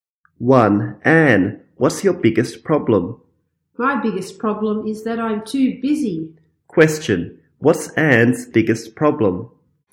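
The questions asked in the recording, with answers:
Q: What's Anne's biggest problem?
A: She is too busy.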